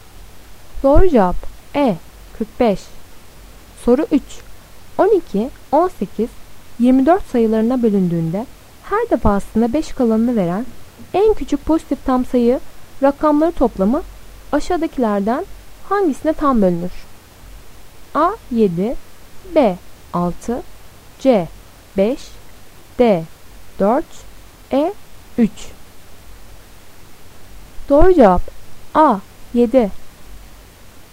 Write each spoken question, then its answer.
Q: 12, 18, 24 sayılarına bölündüğünde her defasında 5 kalanını veren en küçük pozitif tam sayı rakamları toplamı aşağıdakilerden hangisine tam bölünür?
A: Doğru cevap A 7.